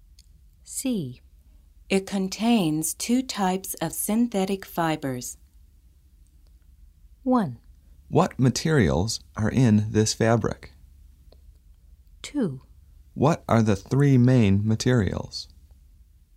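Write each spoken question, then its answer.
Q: It contains two types of synthetic fibers.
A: 1: What materials are in this fabric?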